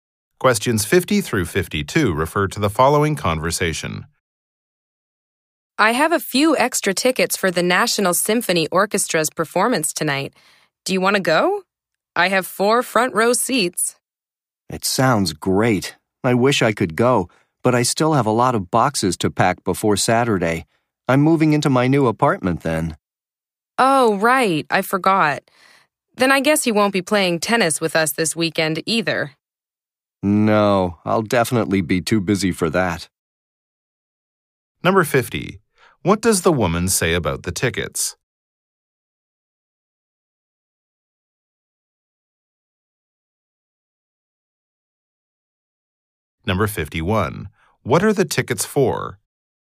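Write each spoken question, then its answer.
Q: about the tickets?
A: She has four front row seats

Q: What are the tickets for?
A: The National Symphony Orchestra's performance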